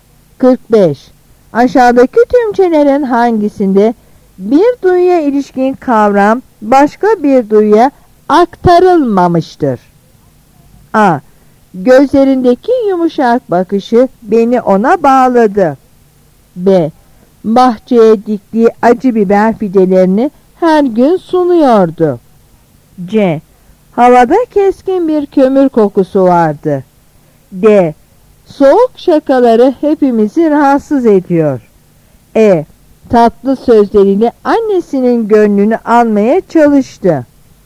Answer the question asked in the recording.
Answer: Yanıt B.